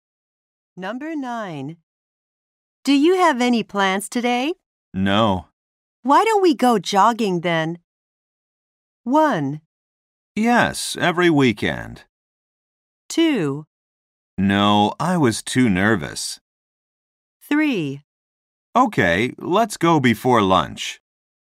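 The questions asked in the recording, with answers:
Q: Why don't we go jogging then?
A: 3: Okay, let's go before lunch.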